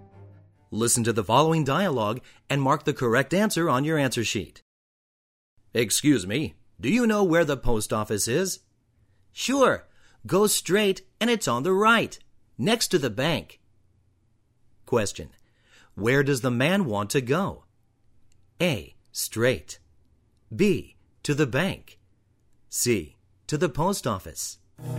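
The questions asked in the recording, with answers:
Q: Where does the man want to go?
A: C: To the post office.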